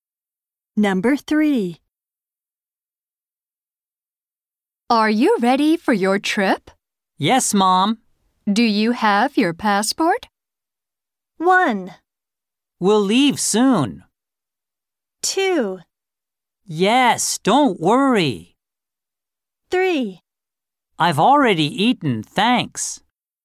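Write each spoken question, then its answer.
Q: Do you have your passport?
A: 2: Yes, don't worry.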